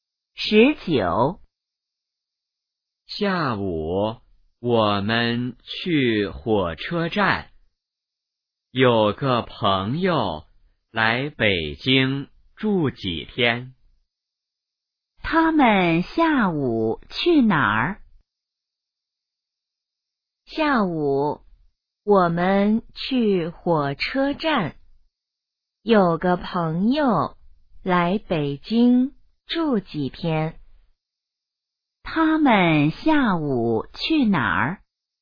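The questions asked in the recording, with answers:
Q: 他们下午去哪儿?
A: 火车站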